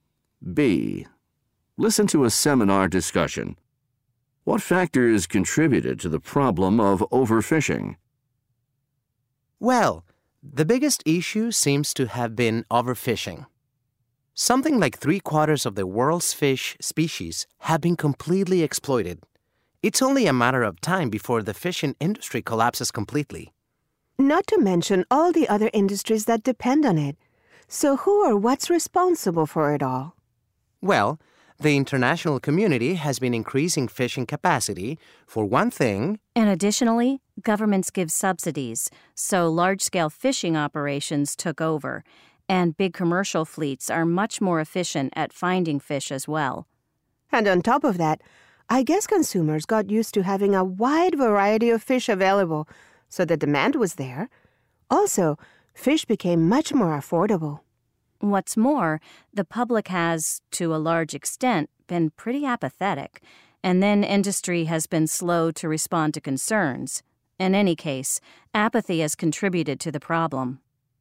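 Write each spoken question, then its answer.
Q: What factors contributed to the problem of overfishing?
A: Increased international fishing capacity, government subsidies, efficient large commercial fleets, consumer demand for a variety of affordable fish, public apathy and slow industry response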